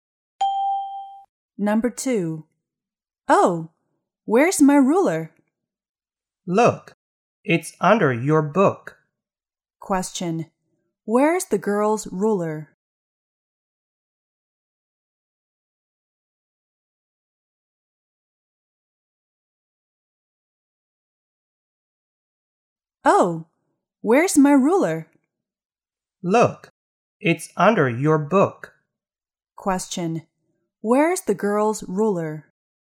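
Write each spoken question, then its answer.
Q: Where's the girl's ruler?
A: Under her book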